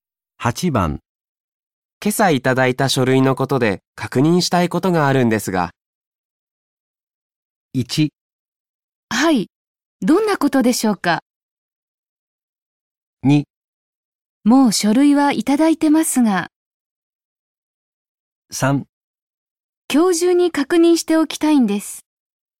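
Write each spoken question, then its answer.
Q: 今朝いただいた書類のことで確認したいことがあるんですが。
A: 1: はい。どんなことでしょうか。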